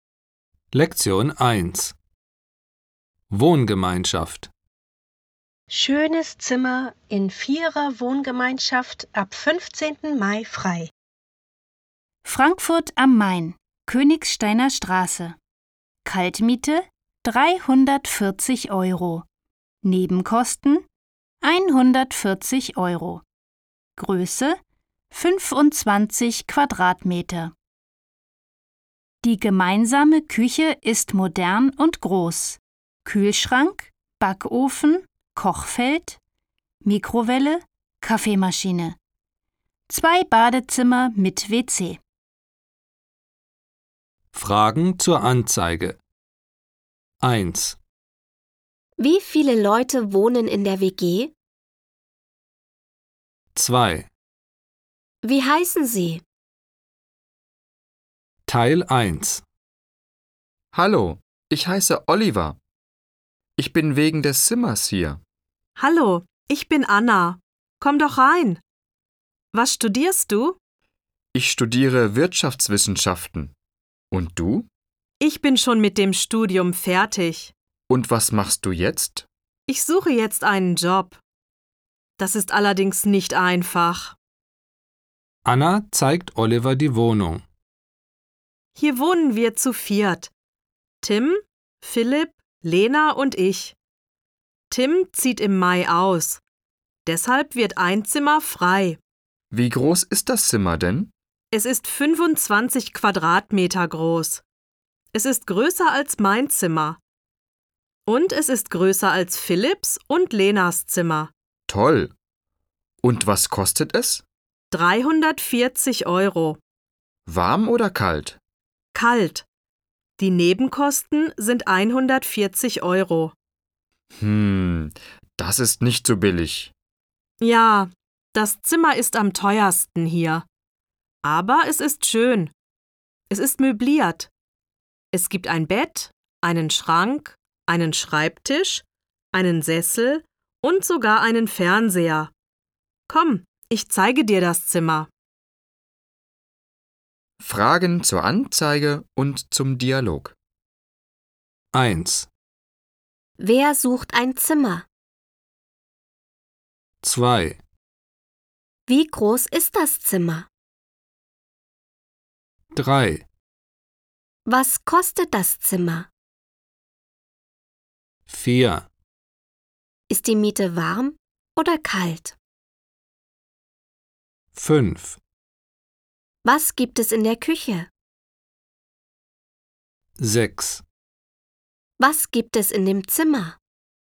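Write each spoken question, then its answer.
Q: Wie viele Leute wohnen in der WG?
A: Vier Leute

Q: Wer sucht ein Zimmer?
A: Oliver

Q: Wie groß ist das Zimmer?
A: 25 Quadratmeter

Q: Was kostet das Zimmer?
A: 340 Euro kalt, plus 140 Euro Nebenkosten

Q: Ist die Miete warm oder kalt?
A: Kalt

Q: Was gibt es in der Küche?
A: Kühlschrank, Backofen, Kochfeld, Mikrowelle, Kaffeemaschine

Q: Was gibt es in dem Zimmer?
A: Ein Bett, einen Schrank, einen Schreibtisch, einen Sessel und einen Fernseher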